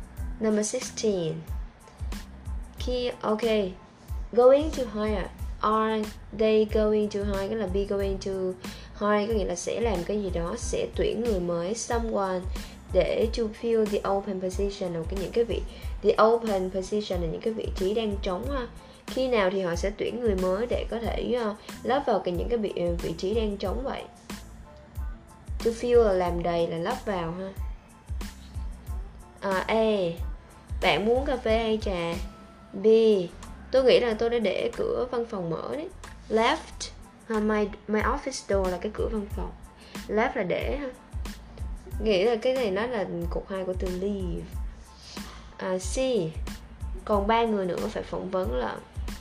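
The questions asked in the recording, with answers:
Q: Khi nào thì họ sẽ tuyển người mới để có thể lắp vào cái những cái vị trí đang trống vậy.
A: C: Còn 3 người nữa phải phỏng vấn.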